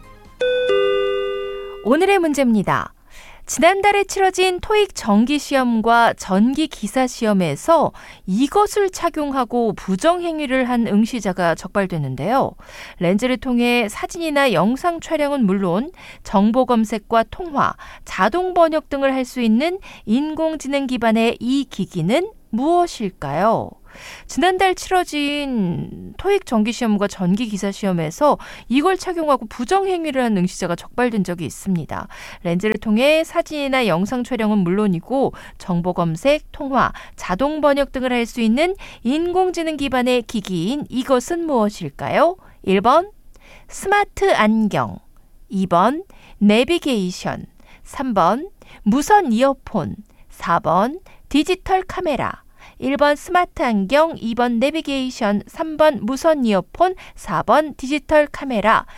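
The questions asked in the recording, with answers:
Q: 렌즈를 통해 사진이나 영상 촬영은 물론이고 정보 검색, 통화, 자동 번역 등을 할 수 있는 인공지능 기반의 기기인 이것은 무엇일까요?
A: 1: 스마트 안경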